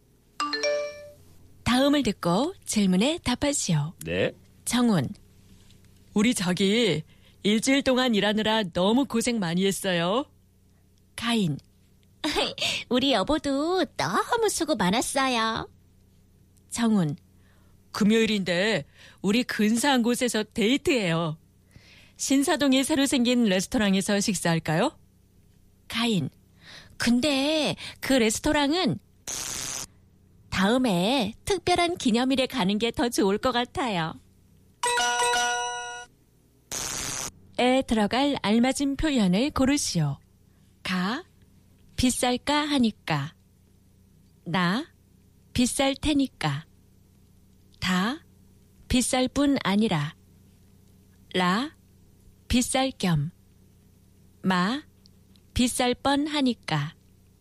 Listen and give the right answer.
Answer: Na. It's it, na, na, my friend.